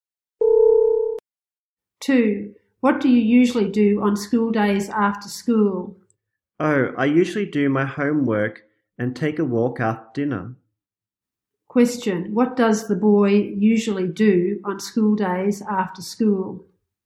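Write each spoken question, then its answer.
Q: Question, what does the boy usually do on school days after school?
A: He does his homework.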